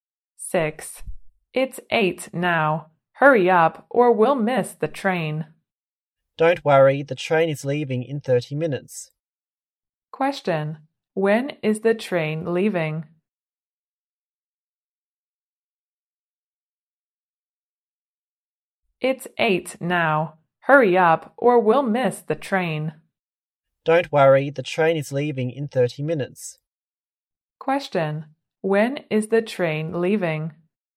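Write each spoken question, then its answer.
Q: When is the train leaving?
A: At 8:30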